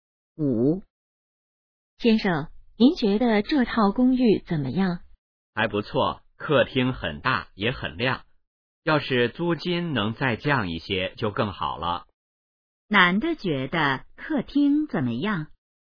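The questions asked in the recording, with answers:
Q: 男的觉得客厅怎么样?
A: 很大,也很亮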